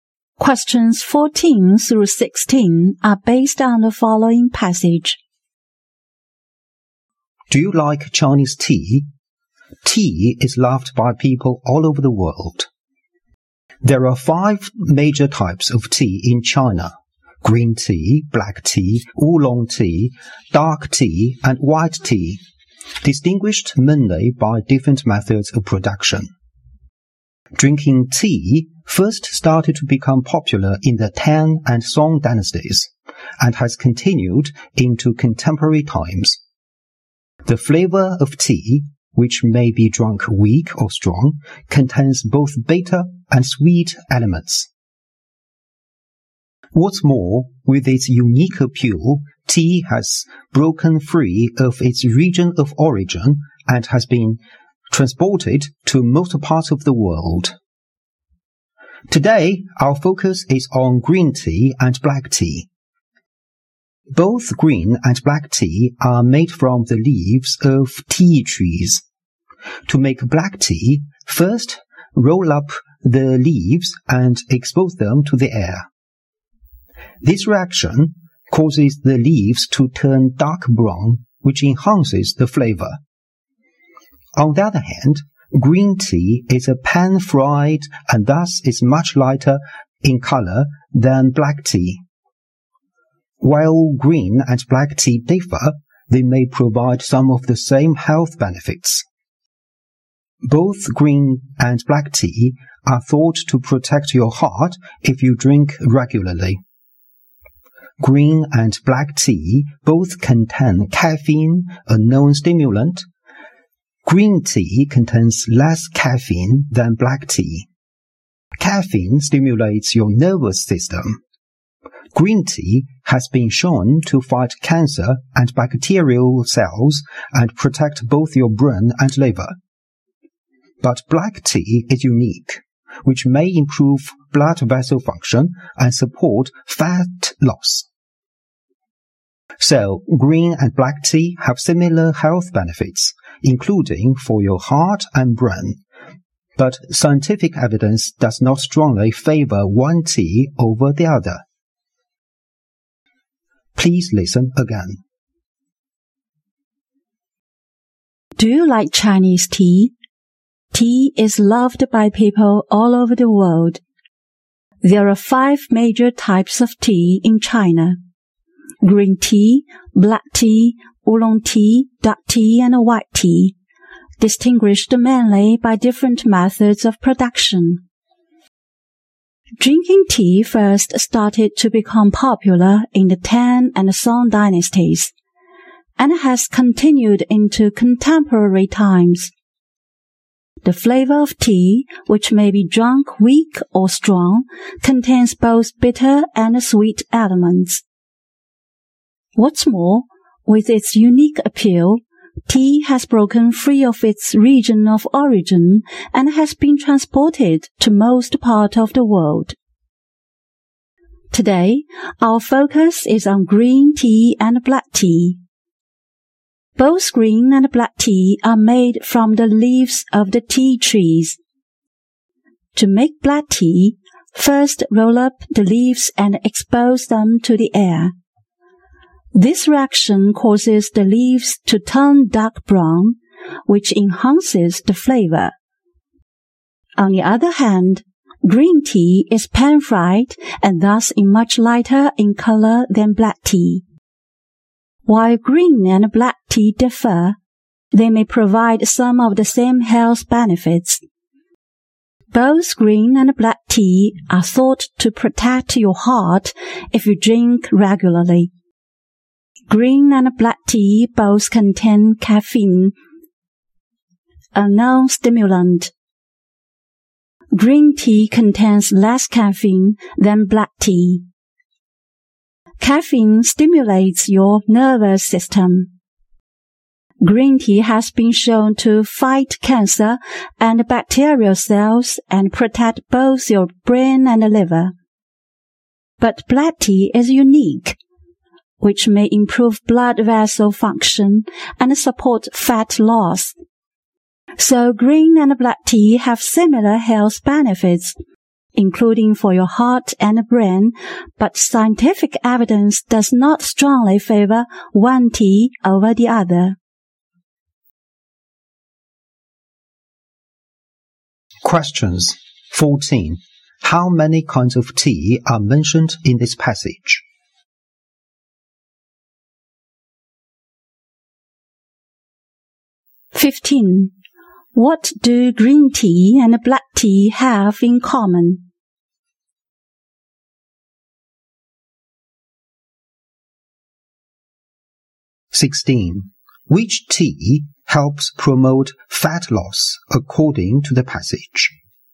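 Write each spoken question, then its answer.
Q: How many kinds of tea are mentioned in this passage?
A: Five.

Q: Which tea helps promote fat loss according to the passage?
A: Black tea.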